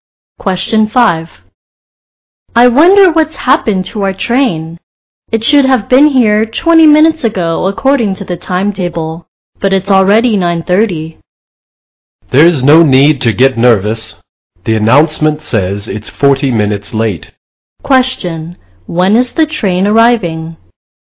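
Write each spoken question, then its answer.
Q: When is the train arriving?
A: At 9:50.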